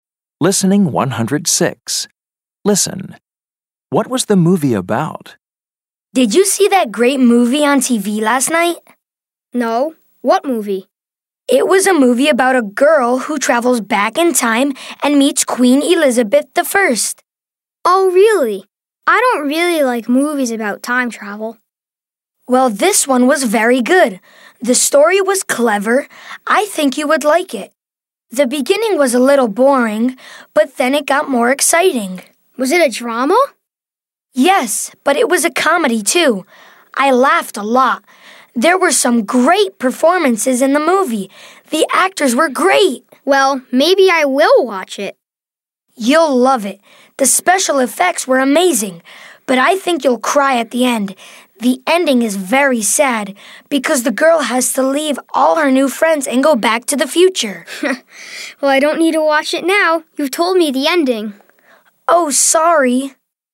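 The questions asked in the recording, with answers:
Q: What was the movie about?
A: A girl who travels back in time and meets Queen Elizabeth I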